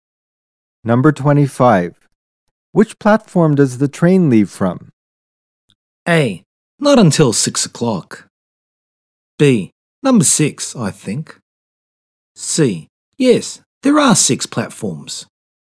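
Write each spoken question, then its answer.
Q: Which platform does the train leave from?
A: B: Number 6, I think.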